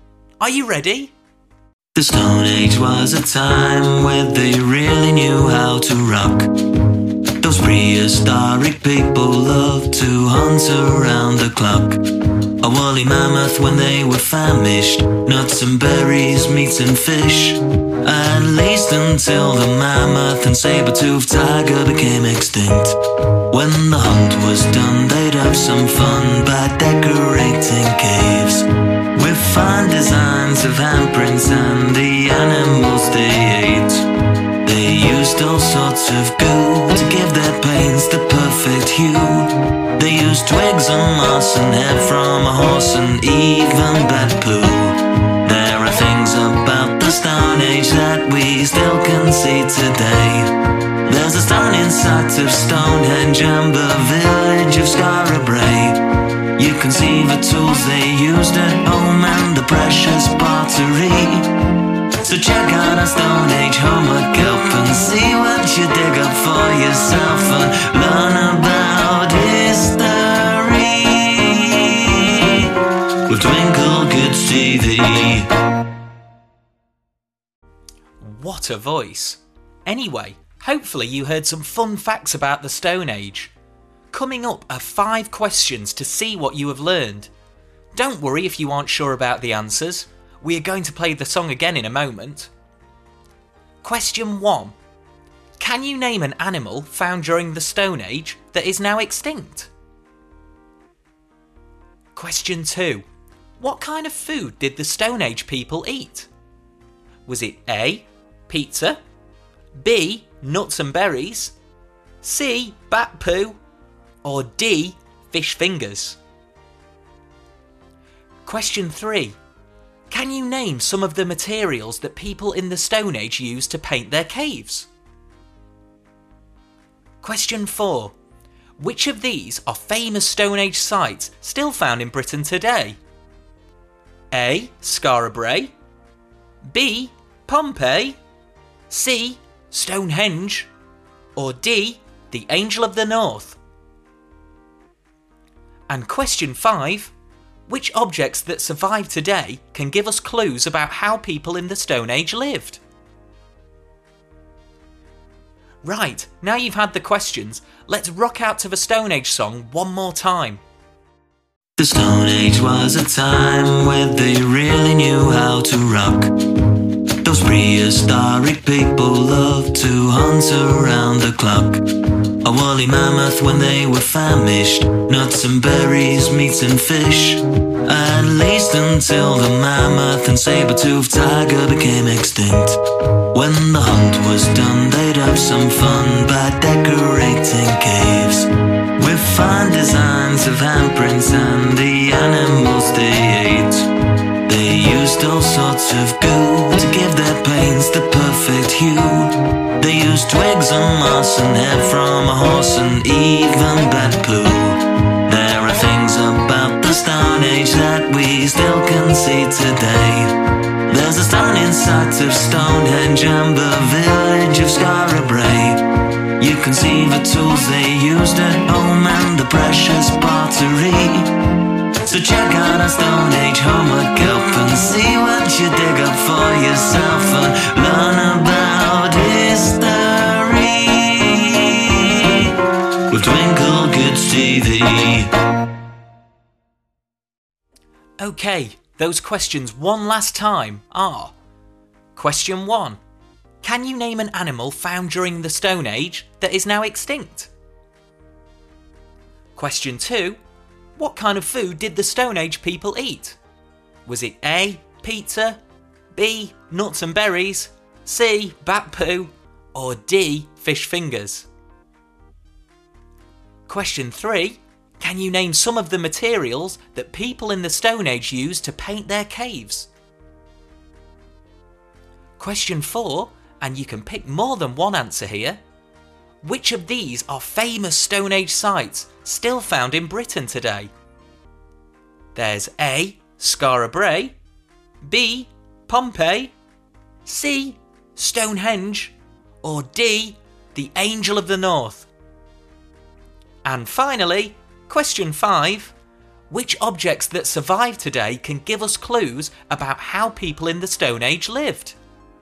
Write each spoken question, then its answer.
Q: Can you name an animal found during the Stone Age that is now extinct?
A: And the answers are either the saber-toothed tiger or the woolly mammoth.

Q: What kind of food did the Stone Age people eat?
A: so the answer was B, nuts and berries.

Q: Can you name some of the materials that people in the Stone Age used to paint their caves?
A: the answers are twigs, moss, horsehair, and even bat poo.

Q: Which of these are famous Stone Age sites still found in Britain today?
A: so the answers are Scarabray Brae and Stonehenge.

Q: Which objects that survive today can give us clues about how people in the Stone Age lived?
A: there are tools and pottery that tell us more about these fascinating folk.